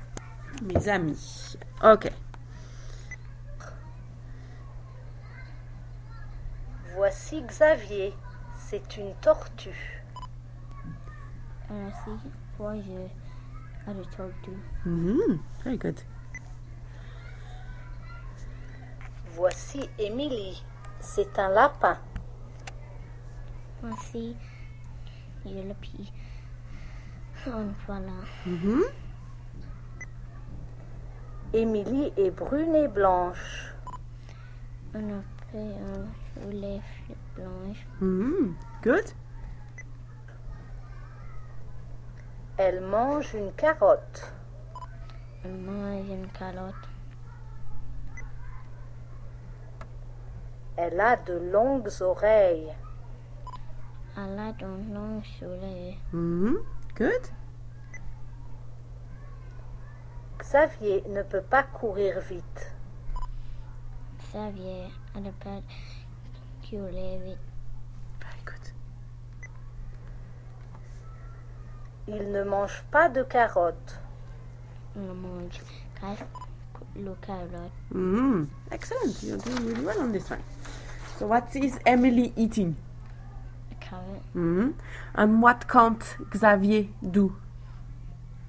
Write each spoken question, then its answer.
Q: So what is Emily eating?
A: A carrot.